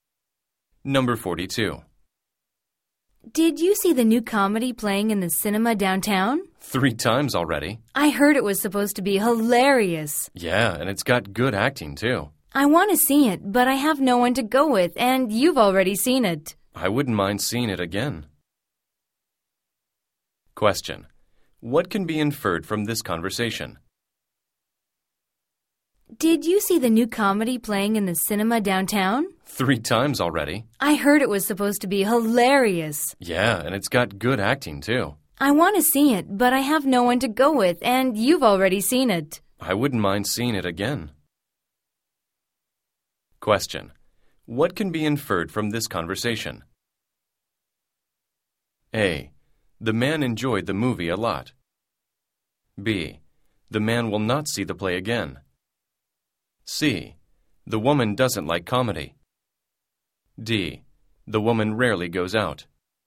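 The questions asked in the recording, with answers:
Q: What can be inferred from this conversation?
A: A: The man enjoyed the movie a lot.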